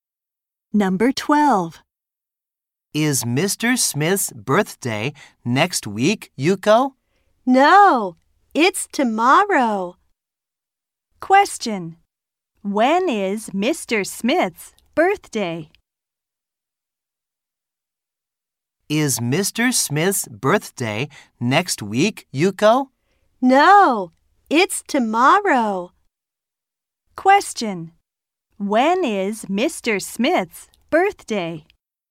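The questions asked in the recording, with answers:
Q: Question.When is Mr. Smith's birthday?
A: Tomorrow.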